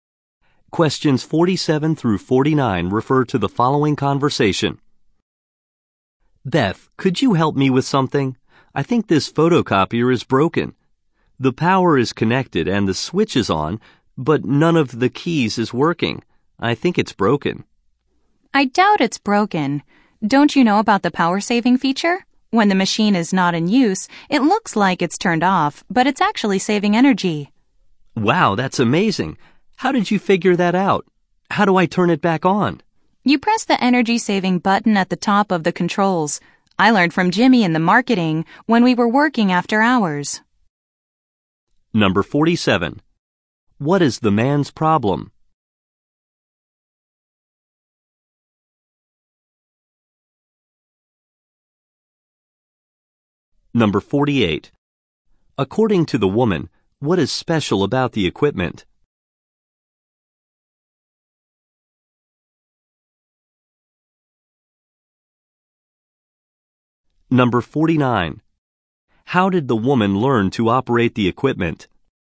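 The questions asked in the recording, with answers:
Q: What is the man's problem?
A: The photocopier seems not to work.

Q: According to the woman, what is special about the equipment?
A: It has a power-saving feature.

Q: How did the woman learn to operate the equipment?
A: From Jimmy in marketing.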